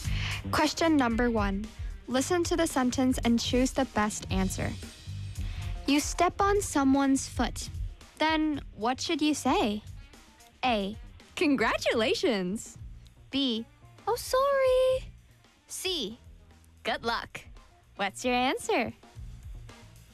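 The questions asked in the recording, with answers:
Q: Then what should you say?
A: B: Oh, sorry.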